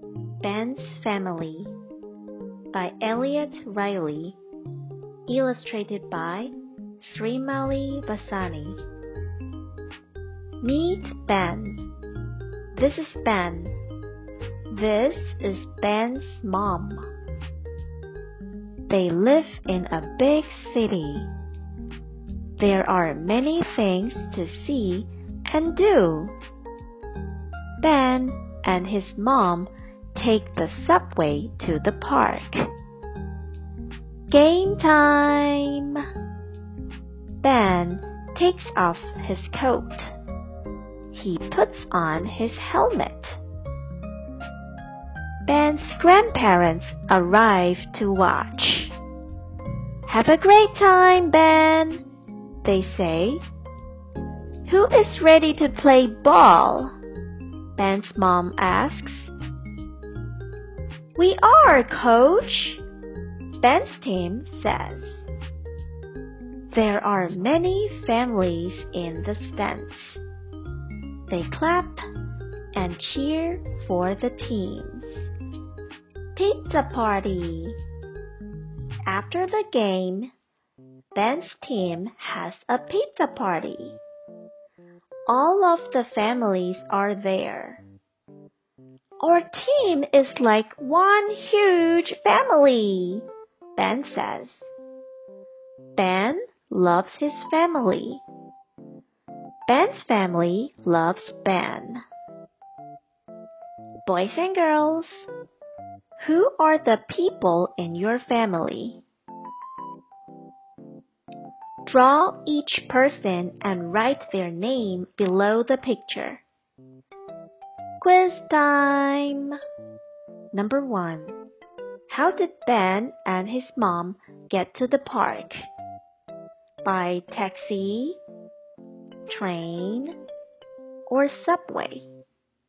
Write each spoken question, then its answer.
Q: How did Ben and his mom get to the park?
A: The answer is subway.